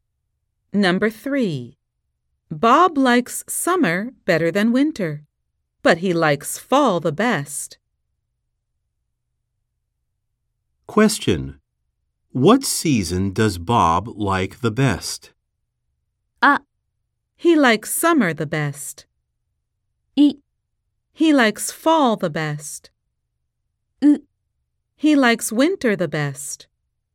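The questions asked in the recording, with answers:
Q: What season does Bob like the best?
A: B: He likes fall the best.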